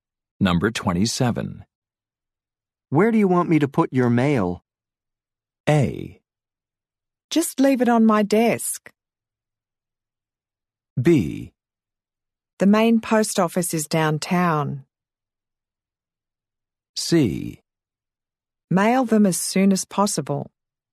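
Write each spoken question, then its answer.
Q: Where do you want me to put your mail?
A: A: Just leave it on my desk.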